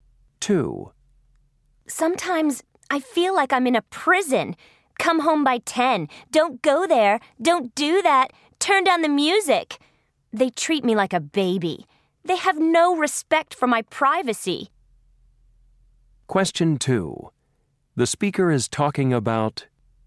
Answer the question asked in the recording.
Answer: My parents forget that I'm 17 years old.